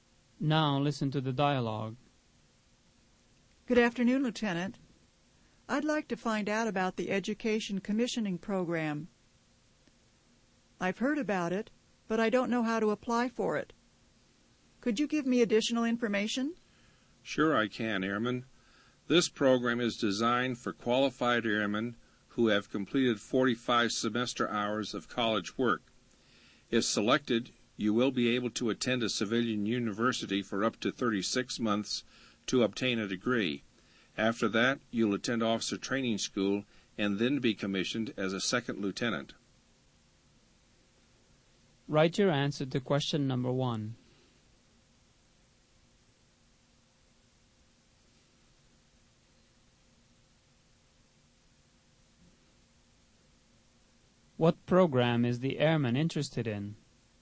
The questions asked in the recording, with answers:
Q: What program is the airman interested in?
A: The airman is interested in the Education Commissioning Program.